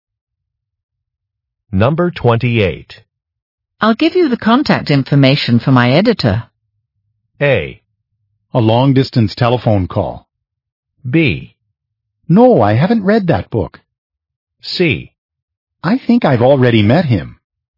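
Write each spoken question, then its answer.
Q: I'll give you the contact information for my editor.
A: C: I think I've already met him.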